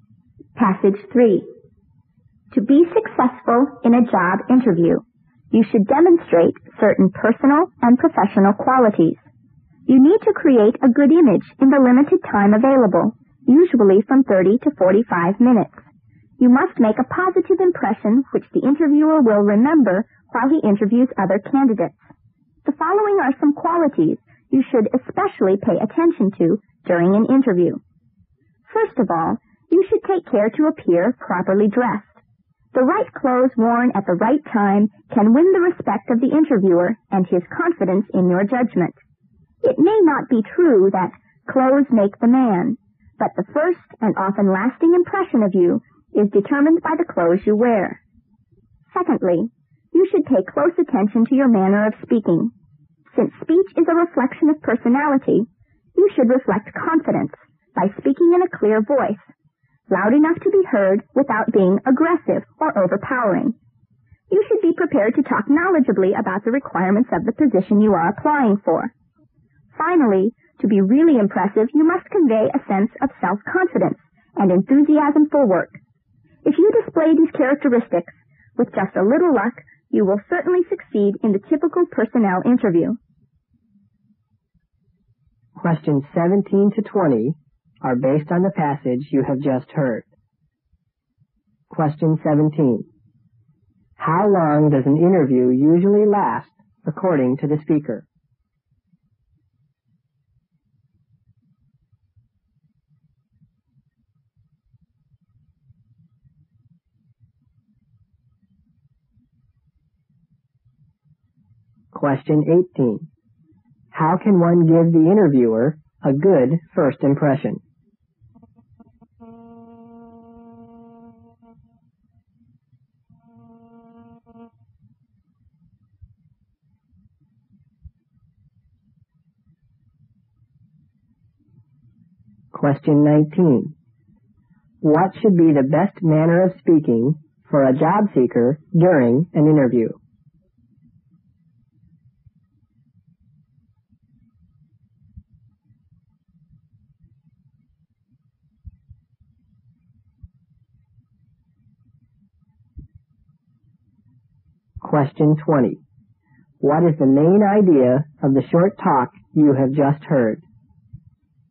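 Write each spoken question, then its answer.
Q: How long does an interview usually last according to the speaker?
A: Usually 30 to 45 minutes

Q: How can one give the interviewer a good first impression?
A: By being properly dressed

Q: What should be the best manner of speaking for a job seeker during an interview?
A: Confident and clear, loud enough to be heard without being aggressive

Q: What is the main idea of the short talk you have just heard?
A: The qualities needed to succeed in a job interview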